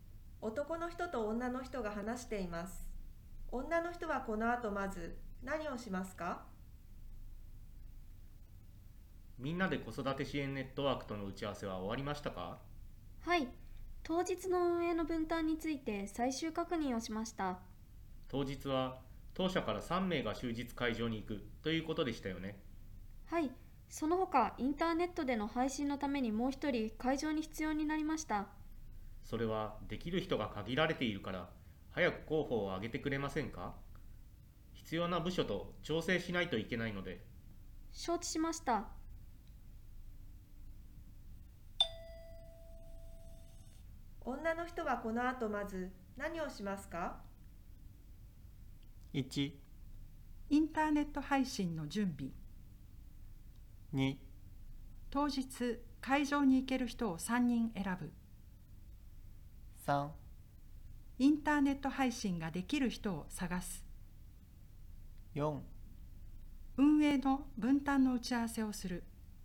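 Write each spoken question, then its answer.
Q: 女の人はこの後まず何をしますか?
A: 3: インターネット配信ができる人を探す。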